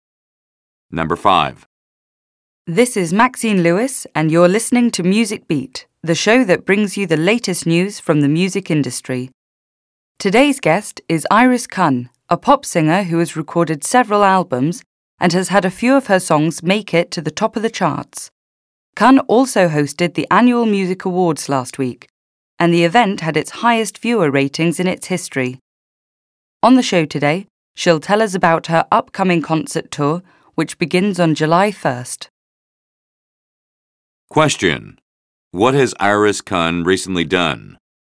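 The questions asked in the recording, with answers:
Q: What has Iris Kun recently done?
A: She hosted the annual Music Awards.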